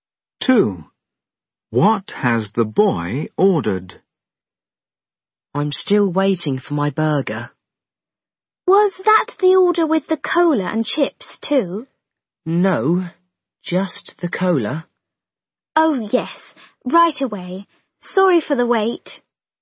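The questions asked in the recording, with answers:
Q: What has the boy ordered?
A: a burger and a cola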